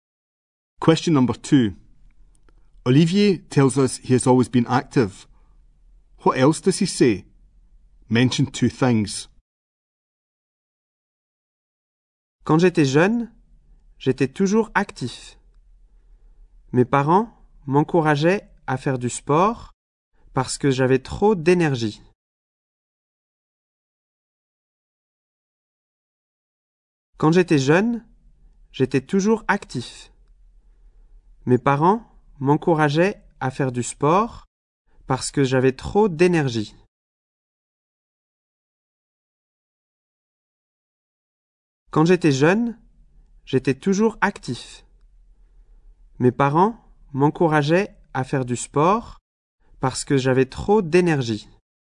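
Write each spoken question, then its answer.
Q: What else does he say? Mention two things.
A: His parents encouraged him to do sport because he had too much energy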